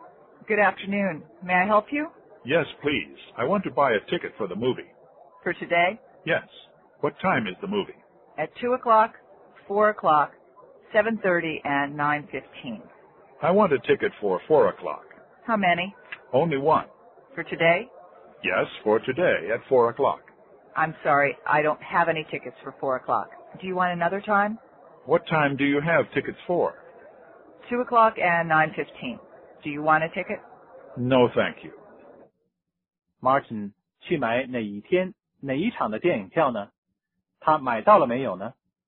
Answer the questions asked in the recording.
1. 他想要一张4点钟的票。
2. 没有。因为4点钟那场的票已经卖完了,只剩下2点和9:15的票了。